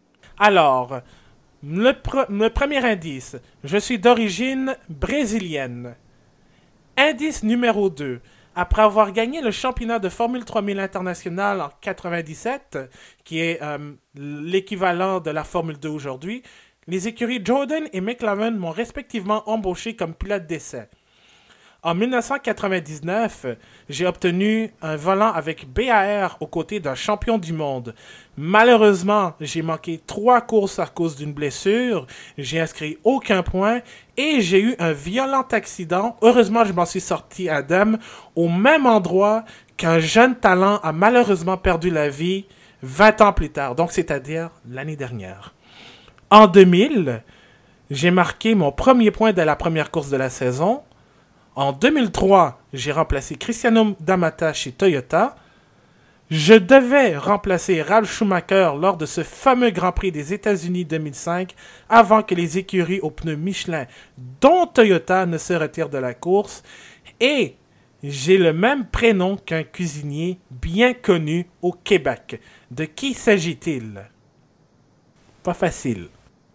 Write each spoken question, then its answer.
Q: De qui s'agit-il?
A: Ricardo Zonta, qui a été pilote de 99 à 2005, on va dire.